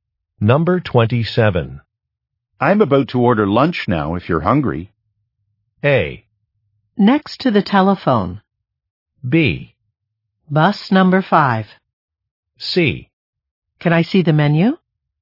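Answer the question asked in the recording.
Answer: C: Can I see the menu?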